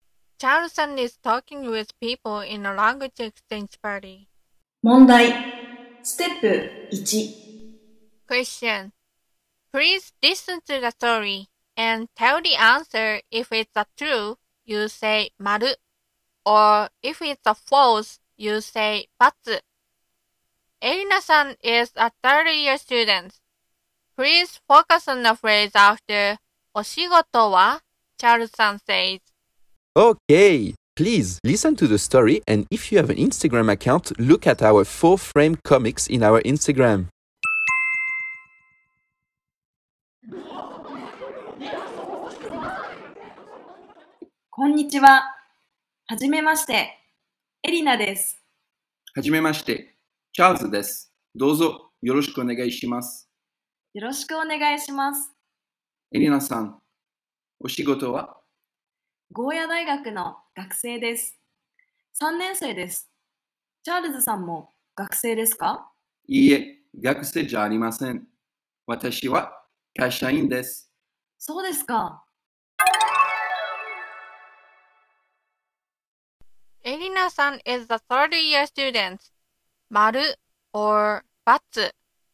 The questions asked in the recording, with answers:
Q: Erina-san is a third-year student. Maru or Batsu?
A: So it's Maru.